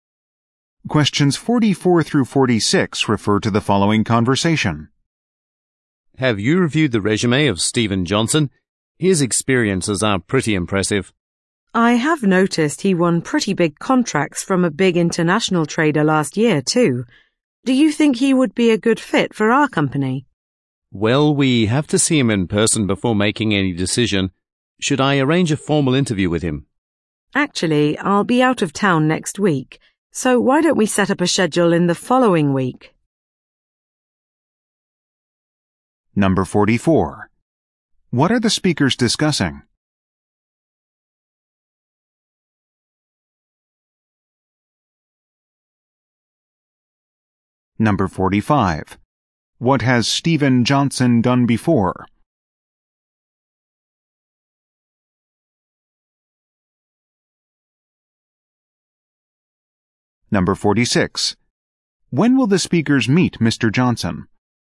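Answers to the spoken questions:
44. A job candidate's resume
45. Won big contracts from an international trader
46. The week after next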